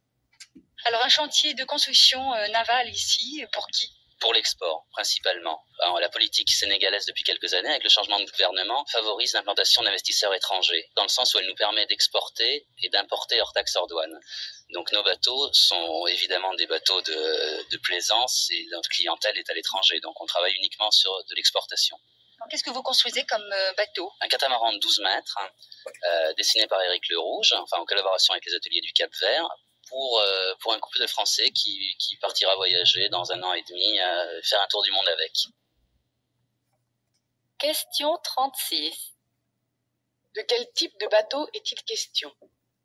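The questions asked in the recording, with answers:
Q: De quel type de bateau est-il question ?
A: Un catamaran de 12 mètres (bateau de plaisance)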